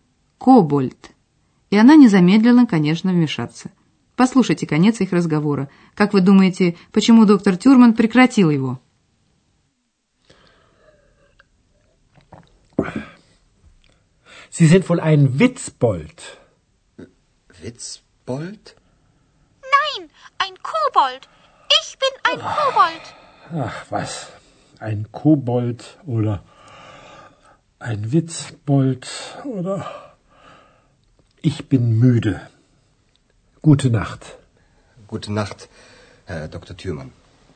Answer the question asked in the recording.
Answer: Доктор Тюрман прекратил разговор, потому что он устал.